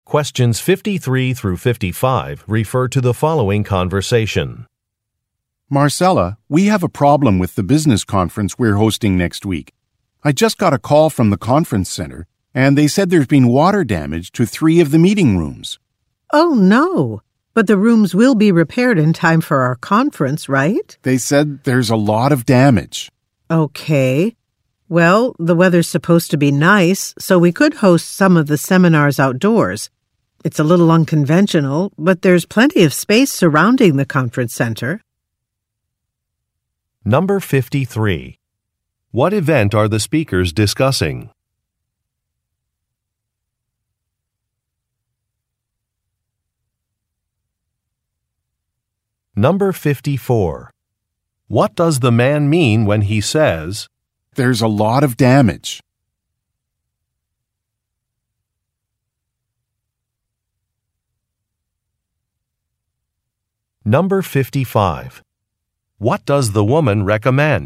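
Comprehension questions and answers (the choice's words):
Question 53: What event are the speakers discussing?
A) A bank opening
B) A contest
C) A business conference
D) A company anniversary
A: A business conference

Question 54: What does the man mean when he says, "there's a lot of damage"?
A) He finally fully understands a problem.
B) The woman should expect a bill in the mail.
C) The woman's assumption is incorrect.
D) A schedule needs to be adjusted.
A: The woman's assumption is incorrect.

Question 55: What does the woman recommend?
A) Using an outdoor area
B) Arranging technical support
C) Confirming a catering menu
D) Interviewing some job applicants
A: Using an outdoor area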